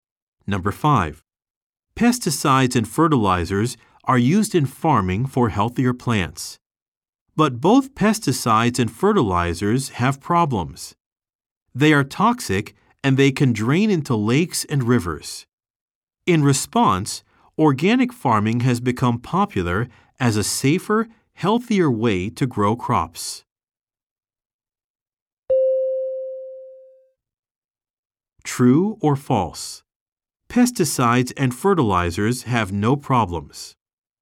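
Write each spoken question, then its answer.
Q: True or false? Pesticides and fertilizers have no problems.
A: False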